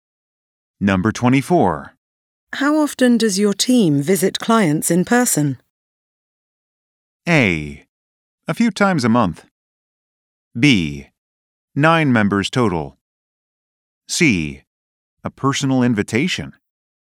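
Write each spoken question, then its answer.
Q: How often does your team visit clients in person?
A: A: A few times a month.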